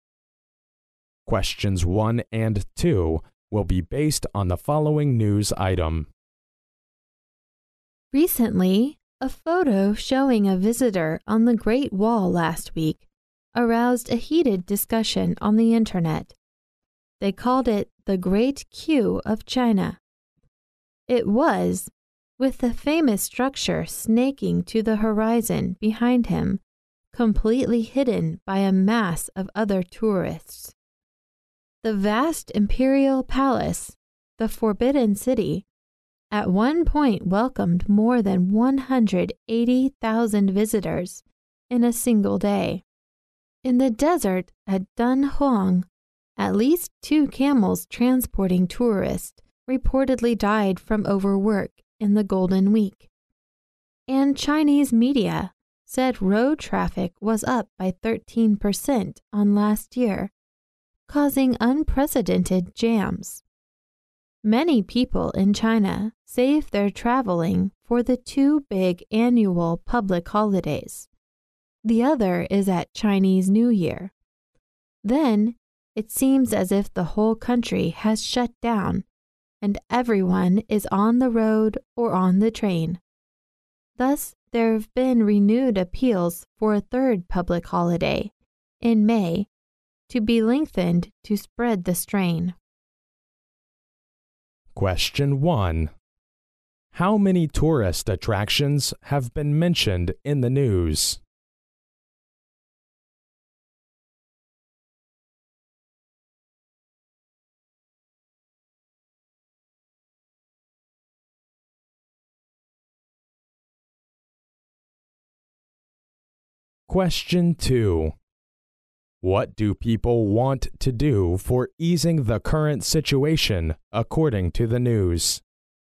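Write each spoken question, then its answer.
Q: How many tourist attractions have been mentioned in the news?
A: Three (the Great Wall, the Forbidden City and Dunhuang)

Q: What do people want to do for easing the current situation, according to the news?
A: Lengthen a third public holiday in May to spread the strain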